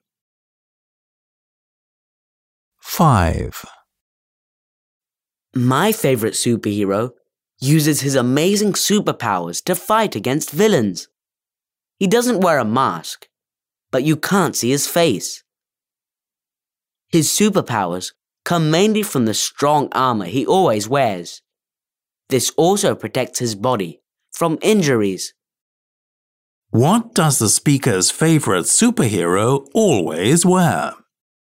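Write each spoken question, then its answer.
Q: What does the speaker's favorite superhero always wear?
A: Armor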